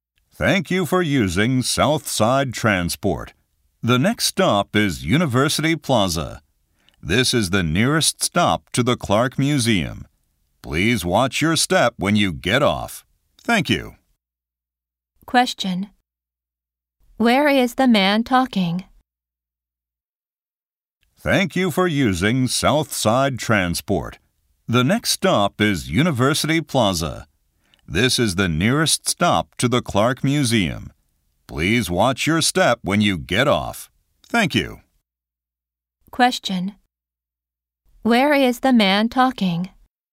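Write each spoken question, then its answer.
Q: Where is the man talking?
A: On a bus.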